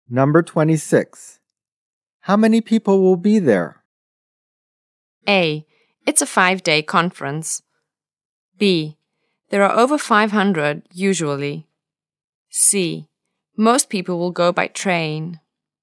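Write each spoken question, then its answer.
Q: How many people will be there?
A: B: There are over 500, usually.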